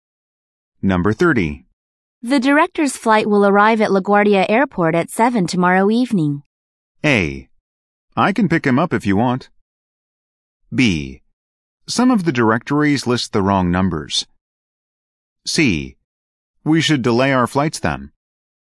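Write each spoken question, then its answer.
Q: The director's flight will arrive at LaGuardia Airport at 7 tomorrow evening.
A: A: I can pick him up if you want.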